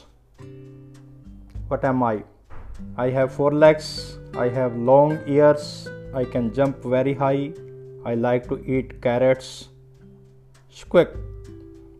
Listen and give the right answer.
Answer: I am a rabbit.